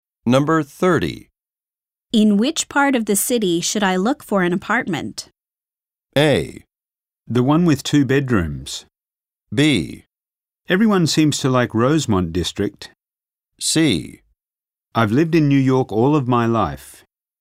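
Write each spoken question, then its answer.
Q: In which part of the city should I look for an apartment?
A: B: Everyone seems to like Rosemont District.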